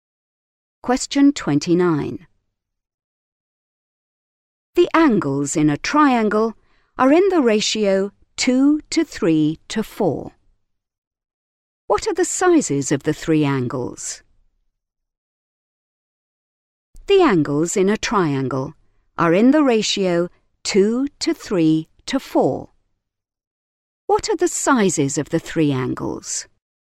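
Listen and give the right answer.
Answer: 40°, 60°, 80°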